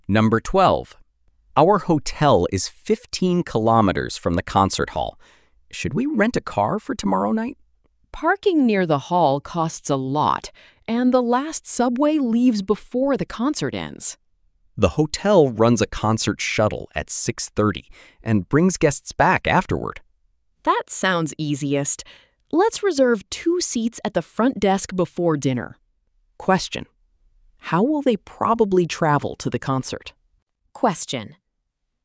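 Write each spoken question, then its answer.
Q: how will they probably travel to the concert?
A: By the hotel's concert shuttle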